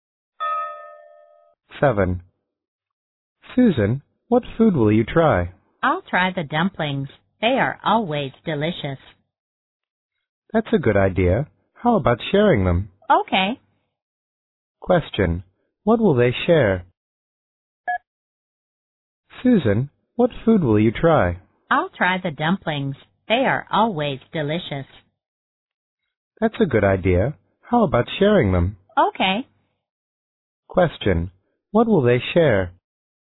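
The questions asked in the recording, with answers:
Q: what will they share?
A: The dumplings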